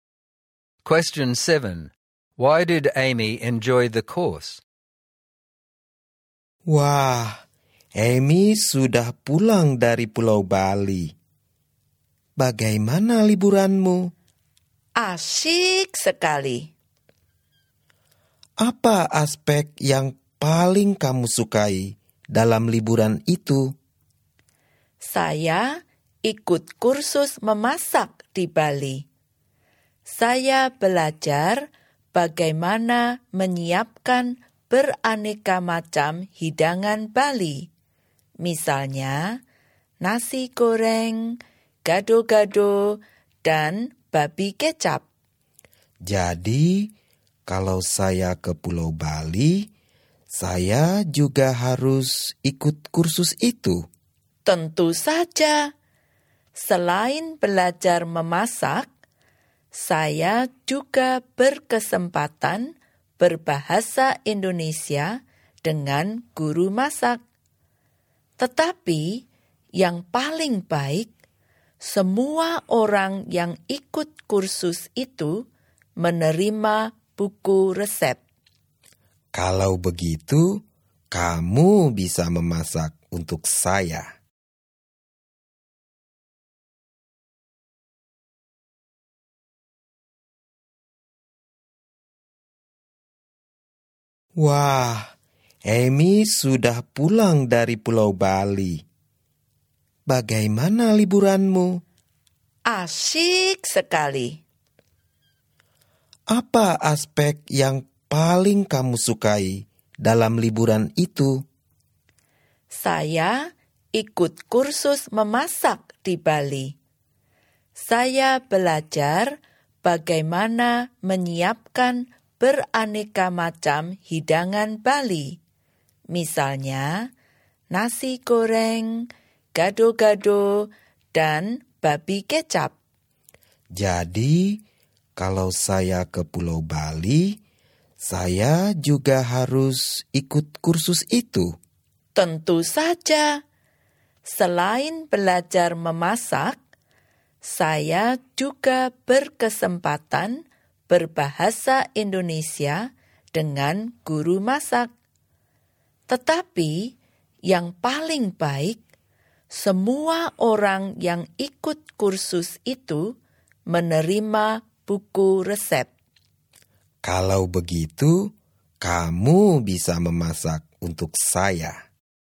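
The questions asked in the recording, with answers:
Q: Why did Amy enjoy the course?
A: She learned to cook Balinese dishes, practised Indonesian with the cooking teacher, and everyone got a recipe book.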